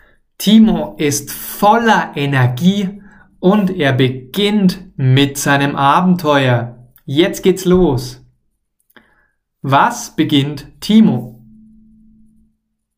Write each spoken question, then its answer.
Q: Was beginnt Timo?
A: Sein Abenteuer. Er beginnt oder er startet sein Abenteuer.